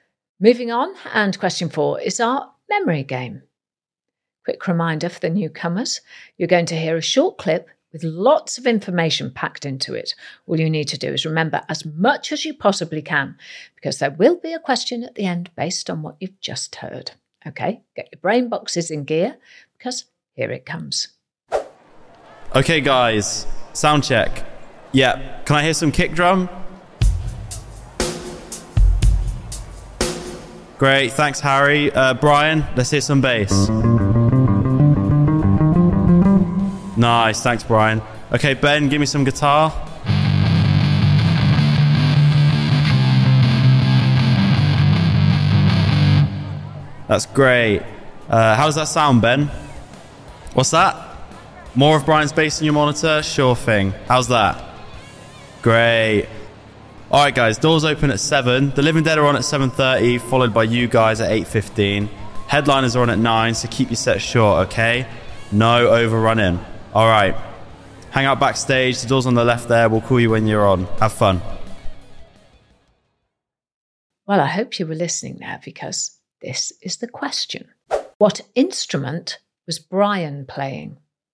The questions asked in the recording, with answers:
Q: What instrument was Brian playing?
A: Brian was playing the bass guitar.